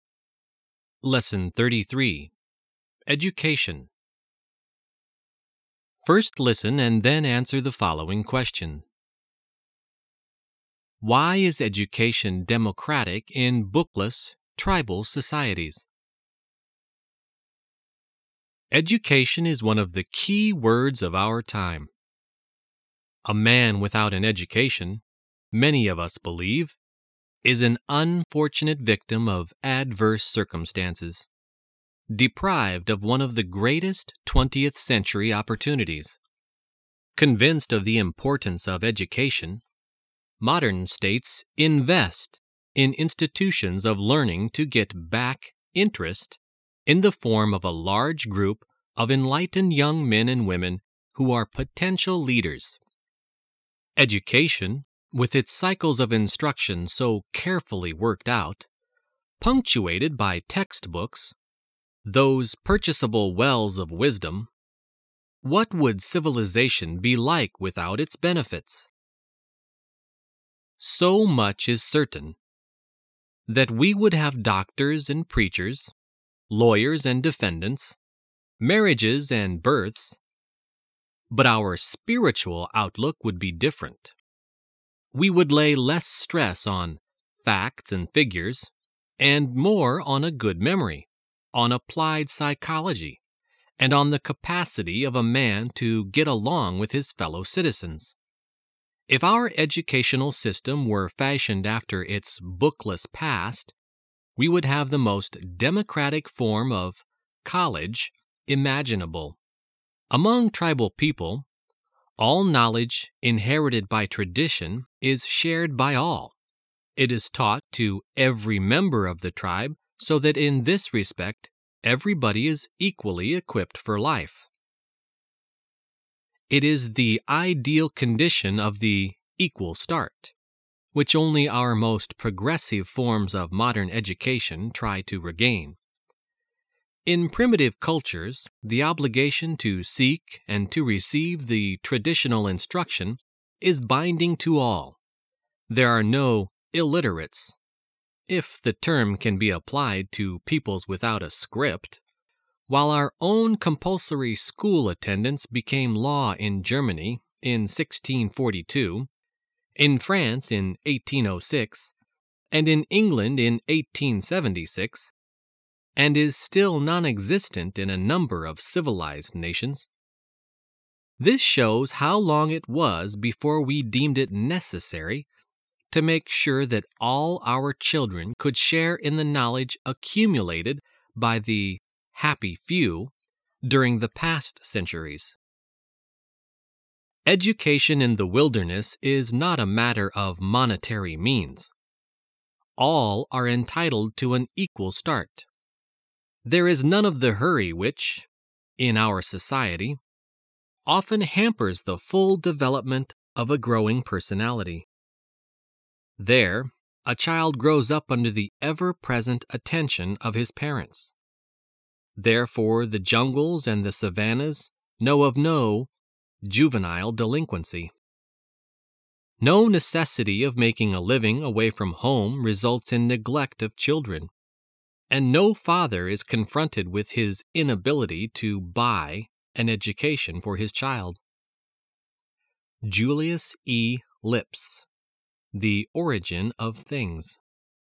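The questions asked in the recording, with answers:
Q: Why is education democratic in bookless, tribal societies?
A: Because all traditional knowledge is shared by all and taught to every member of the tribe, so everyone has an equal start regardless of money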